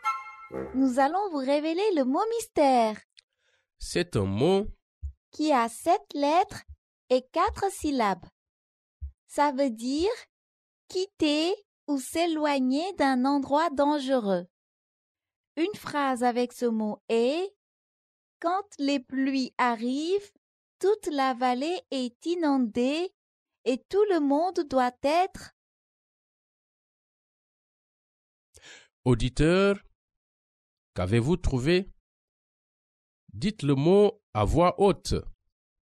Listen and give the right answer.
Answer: Le mot mystère est évacuer.